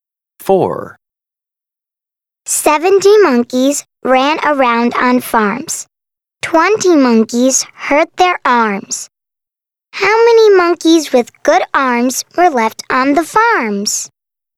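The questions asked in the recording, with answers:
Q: How many monkeys with good arms were left on the farms?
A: 50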